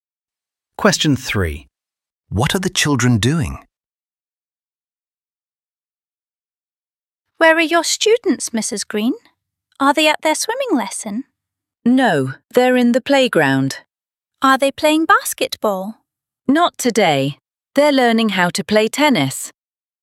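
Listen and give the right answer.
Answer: Learning how to play tennis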